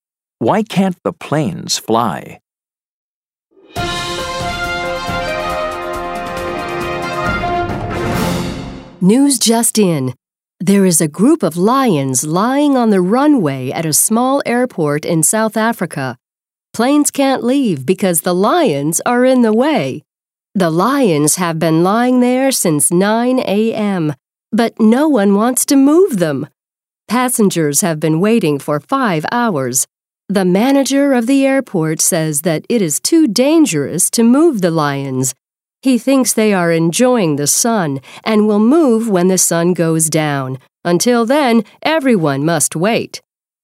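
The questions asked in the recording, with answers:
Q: Why can't the planes fly?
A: Because a group of lions is lying on the runway.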